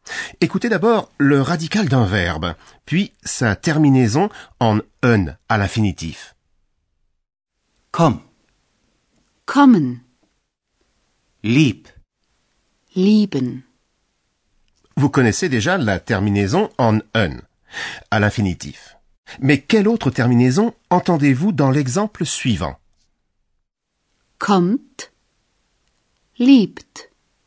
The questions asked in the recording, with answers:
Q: Mais quelle autre terminaison entendez-vous dans l'exemple suivant Kommt, liebt.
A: j'ai entendu un t, un t.